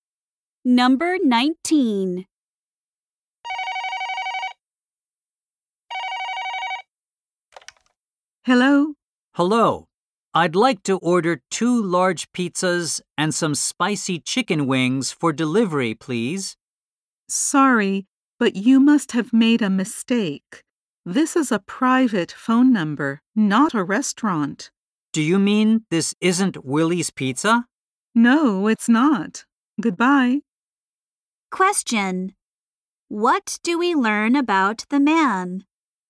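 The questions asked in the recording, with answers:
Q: What do we learn about the man?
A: He called the wrong number.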